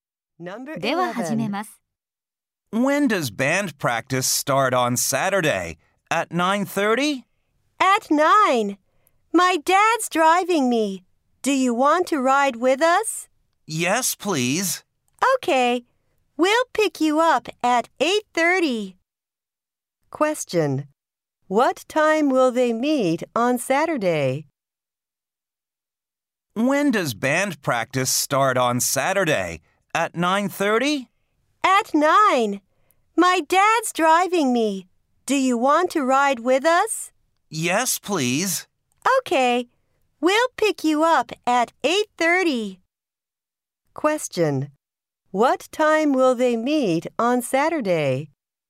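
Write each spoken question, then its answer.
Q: What time will they meet on Saturday?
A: At 8:30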